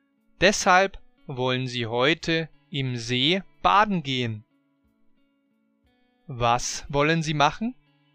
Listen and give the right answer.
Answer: Sie wollen heute im See baden gehen.